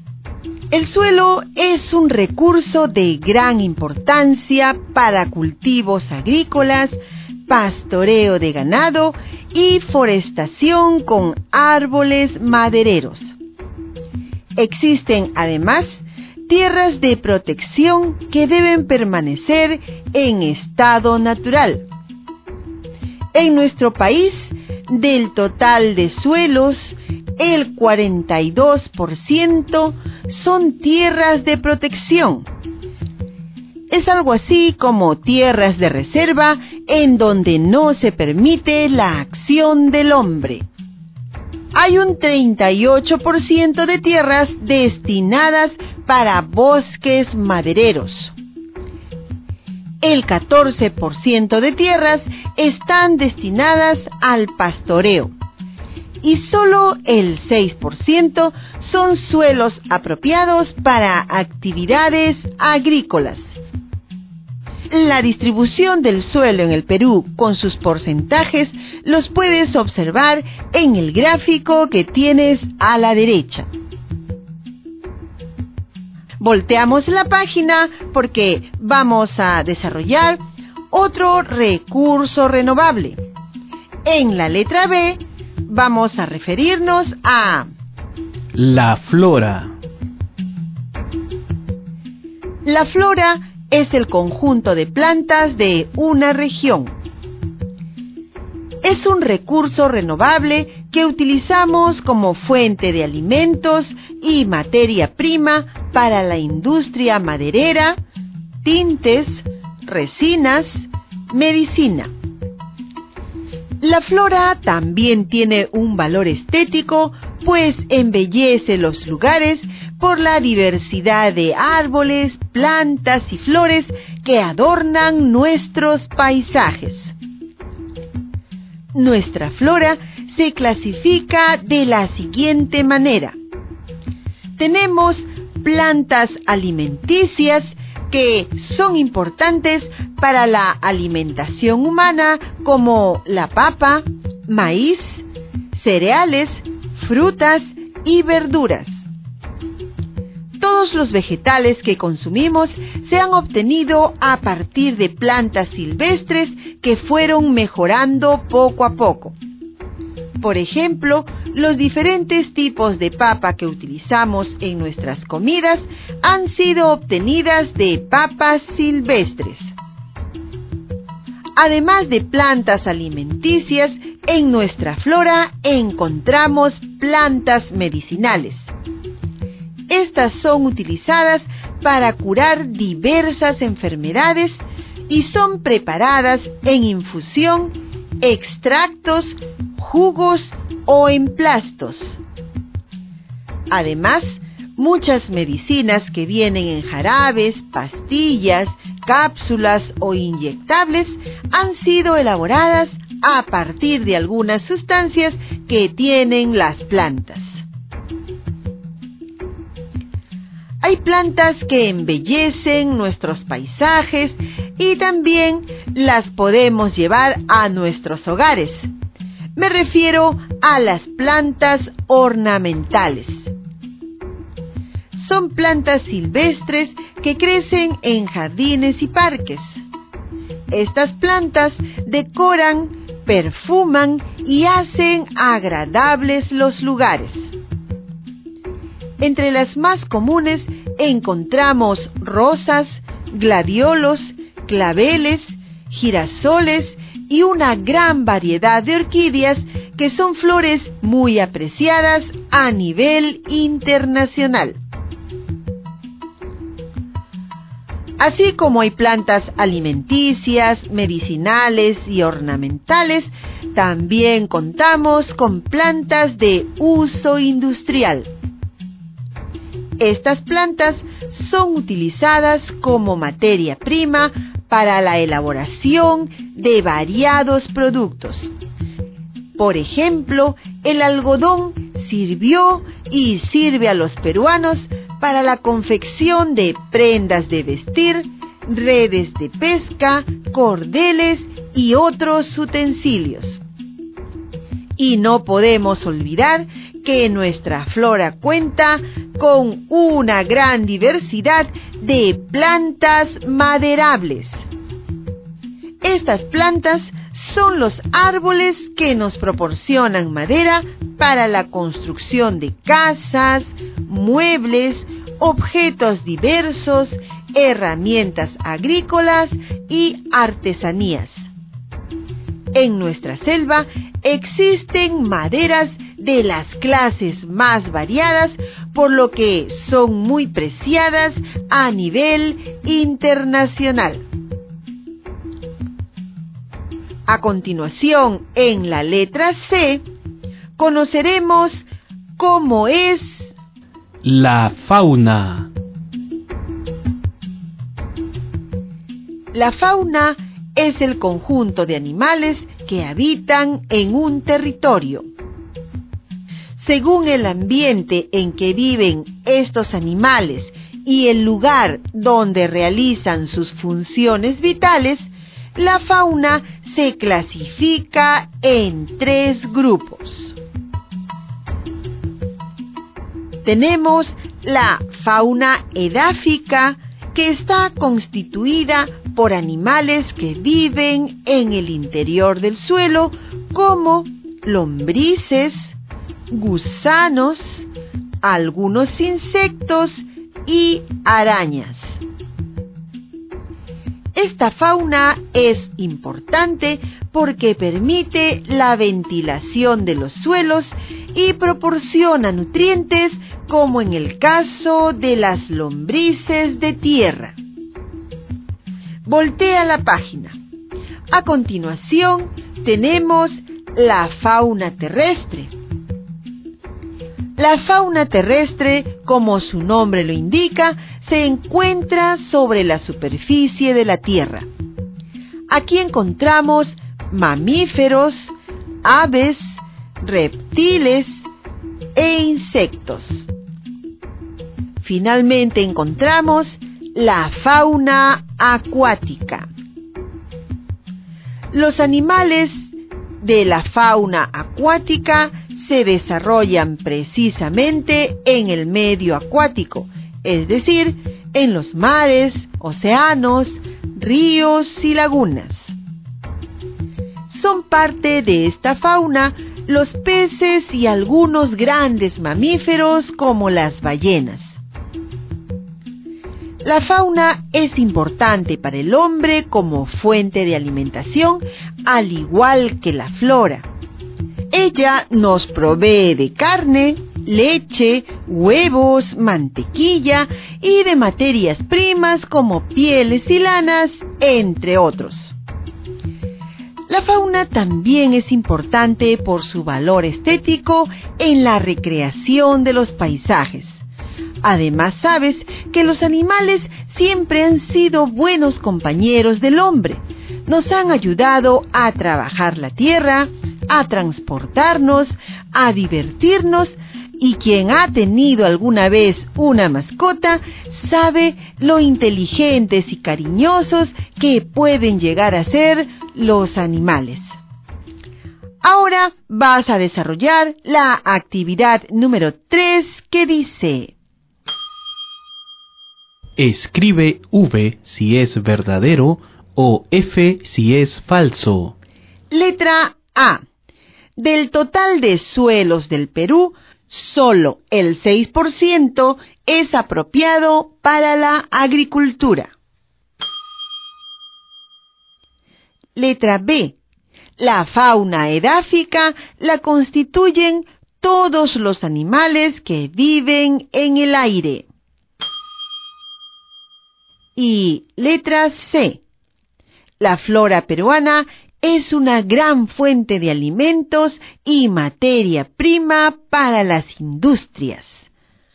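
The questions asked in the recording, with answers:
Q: Del total de suelos del Perú, solo el 6% es apropiado para la agricultura.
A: V (verdadero)

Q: La fauna edáfica la constituyen todos los animales que viven en el aire.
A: F (falso)

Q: La flora peruana es una gran fuente de alimentos y materia prima para las industrias.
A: V (verdadero)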